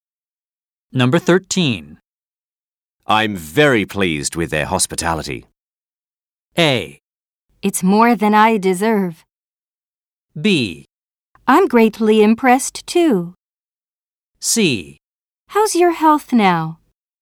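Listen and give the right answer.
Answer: B: I'm greatly impressed too.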